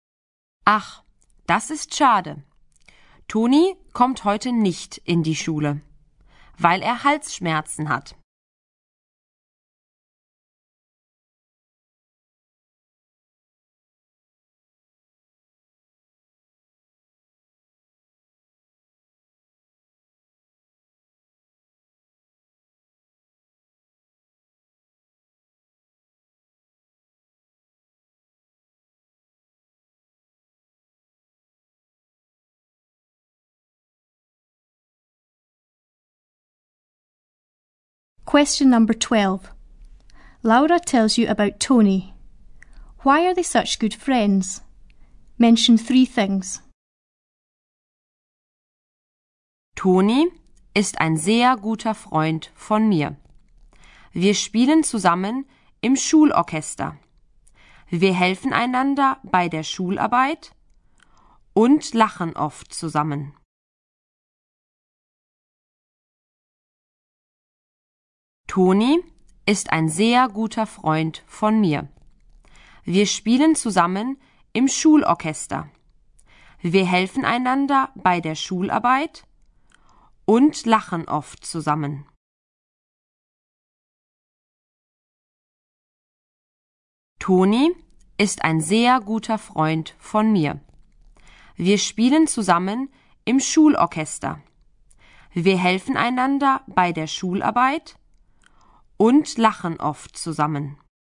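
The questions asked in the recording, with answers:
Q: Why are they such good friends?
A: They play together in the school orchestra, help each other with schoolwork, and often laugh together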